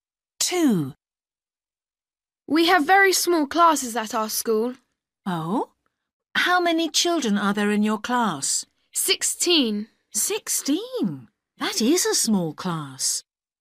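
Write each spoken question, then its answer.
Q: How many children are there in your class?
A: 16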